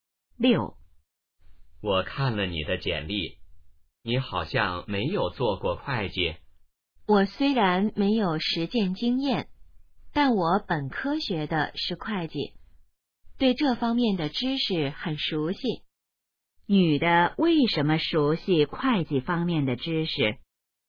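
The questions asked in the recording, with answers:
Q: 女的为什么熟悉会计方面的知识?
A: 她本科学的是会计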